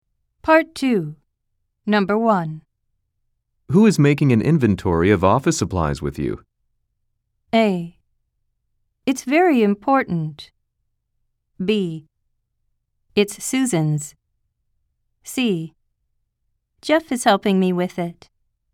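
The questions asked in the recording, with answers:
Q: Who is making an inventory of office supplies with you?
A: C: Jeff is helping me with it.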